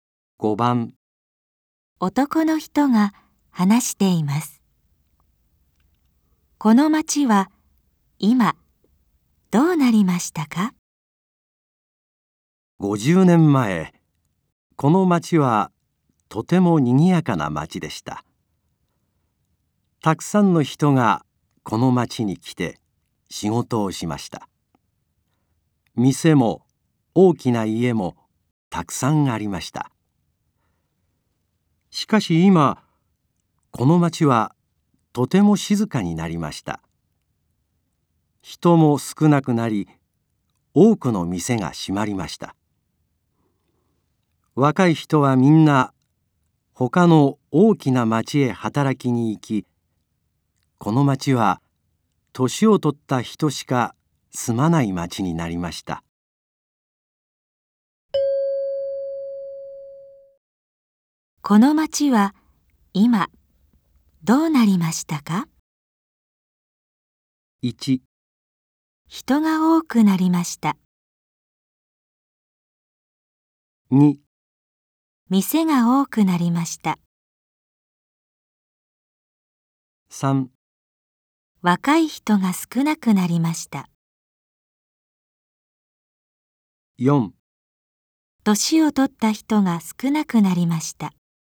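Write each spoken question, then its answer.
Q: この町は今どうなりましたか?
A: 3: 若い人が少なくなりました。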